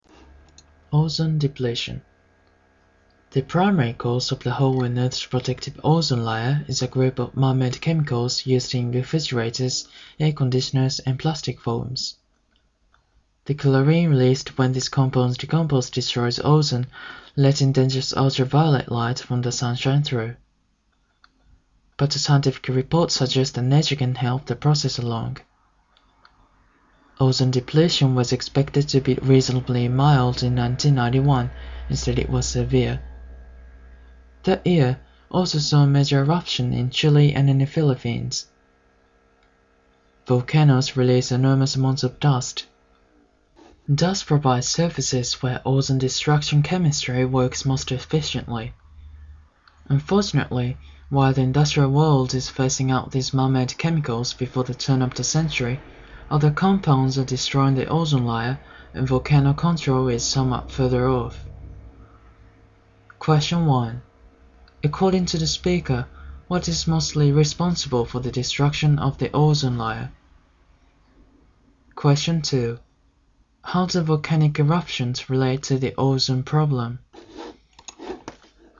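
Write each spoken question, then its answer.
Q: According to the speaker, what is mostly responsible for the destruction of the ozone layer?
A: Man-made chemicals used in refrigerators, air conditioners and plastic foams

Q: How do volcanic eruptions relate to the ozone problem?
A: They release dust that provides surfaces where ozone destruction works most efficiently, making depletion worse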